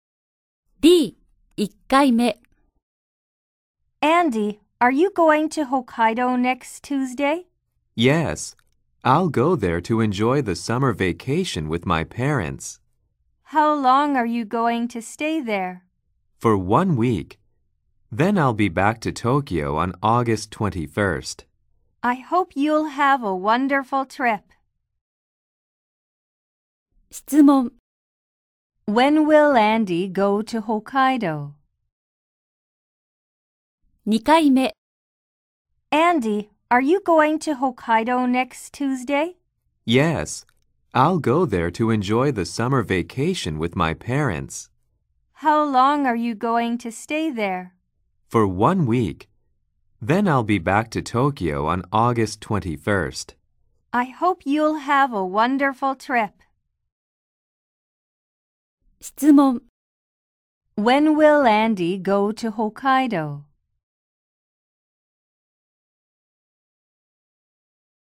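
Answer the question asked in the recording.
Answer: Next Tuesday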